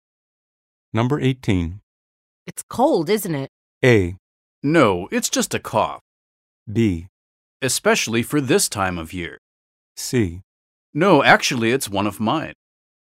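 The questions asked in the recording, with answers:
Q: It's cold, isn't it?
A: B: Especially for this time of year.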